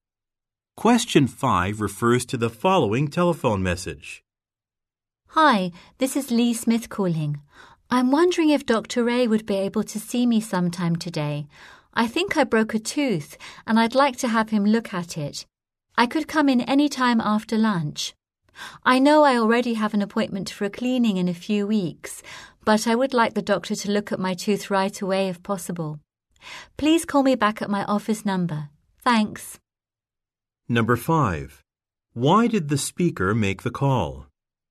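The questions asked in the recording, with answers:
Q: Why did the speaker make the call?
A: To get a dentist appointment today for a broken tooth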